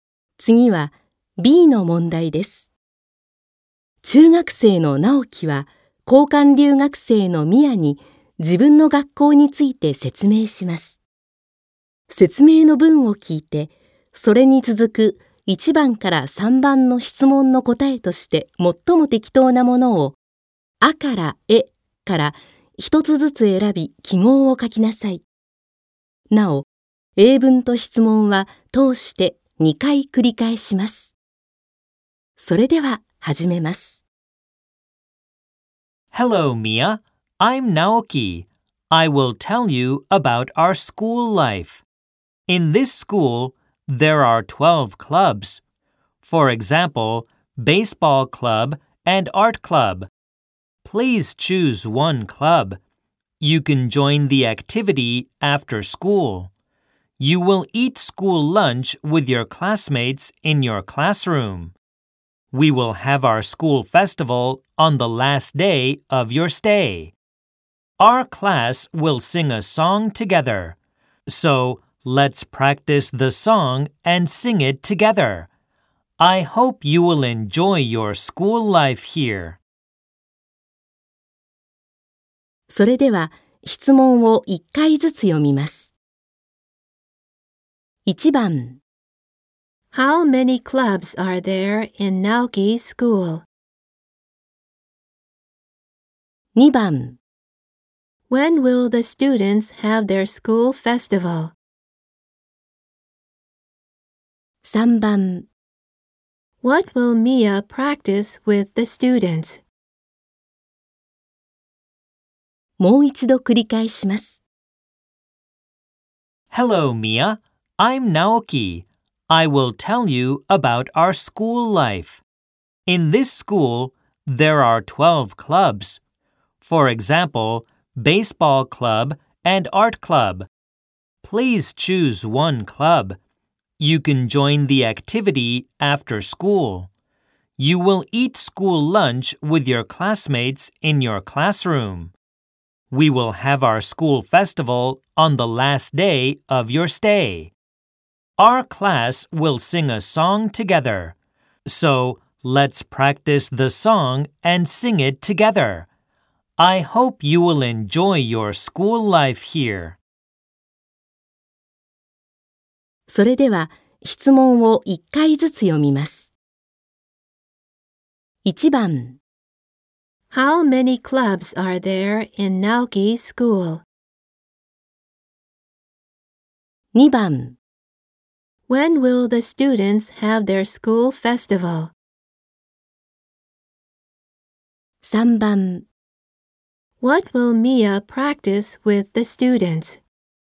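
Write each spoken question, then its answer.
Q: How many clubs are there in Naoki's school?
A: 12

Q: When will the students have their school festival?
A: On the last day of Mia's stay

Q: What will Mia practice with the students?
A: A song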